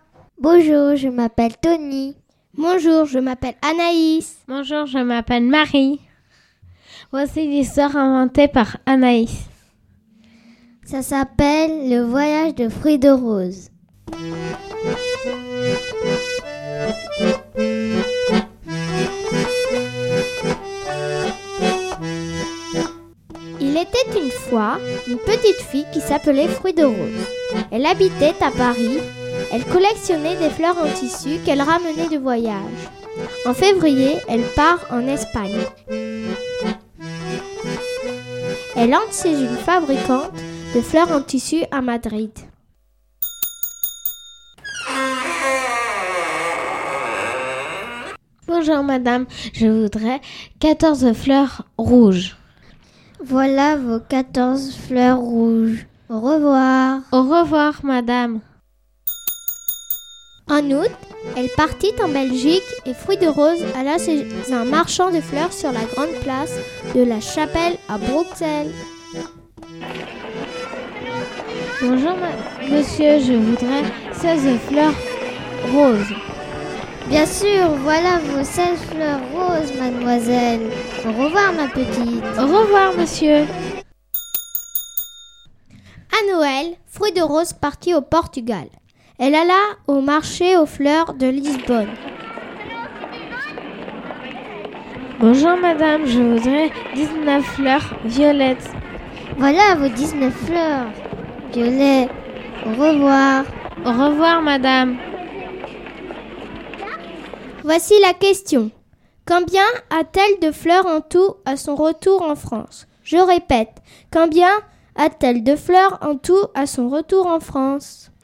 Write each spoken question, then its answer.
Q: Combien a-t-elle de fleurs en tout à son retour en France?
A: En tout, elle a donc 49 fleurs.